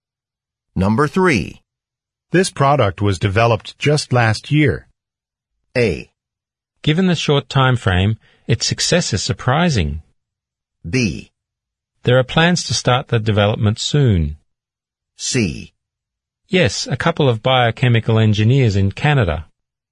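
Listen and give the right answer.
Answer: A: Given the short time frame, its success is surprising.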